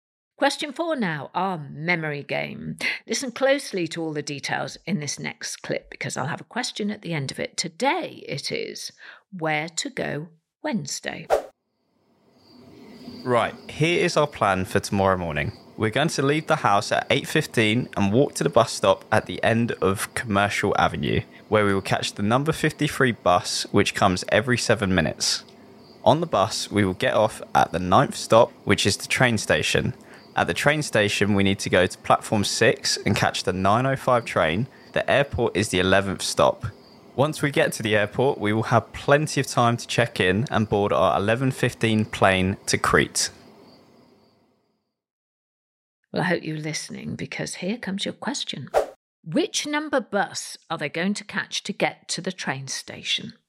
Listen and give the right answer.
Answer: And the answer was the number 53 bus.